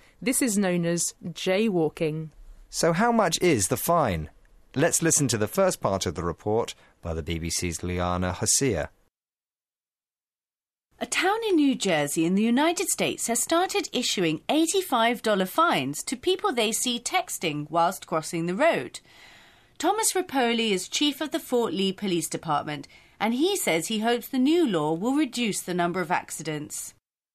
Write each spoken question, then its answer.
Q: So how much is the fine?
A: It's $85, which is a really expensive text message.